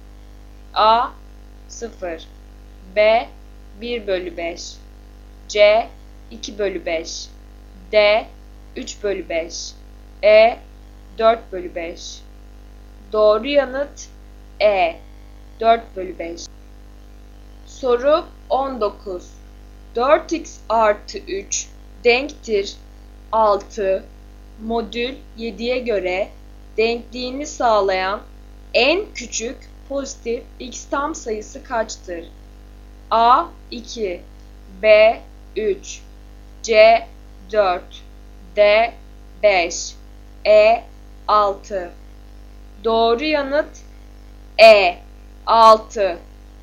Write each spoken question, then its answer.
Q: 4x artı 3 denktir 6 modül 7'ye göre denkliğini sağlayan en küçük pozitif x tam sayısı kaçtır?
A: Doğru yanıt E 6.